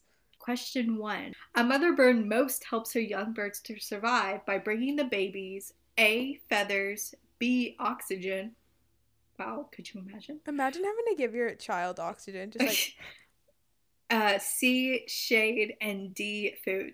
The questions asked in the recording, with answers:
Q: A mother bird most helps her young birds to survive by bringing the babies A, feathers, B, oxygen,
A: but it's clearly food.